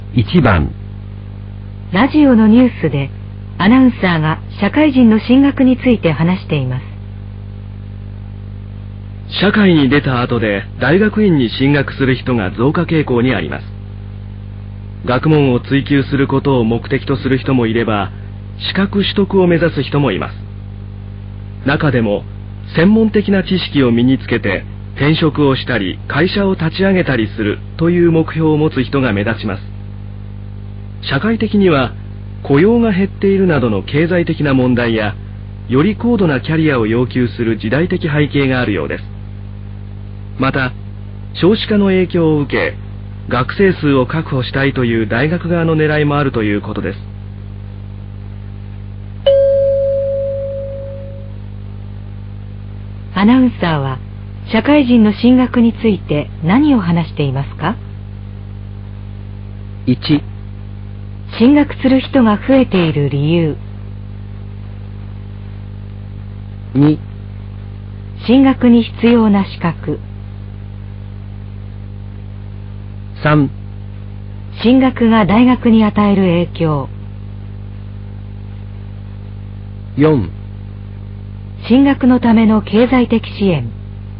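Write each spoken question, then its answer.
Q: アナウンサーは社会人の進学について何を話していますか?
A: 1: 進学する人が増えている理由。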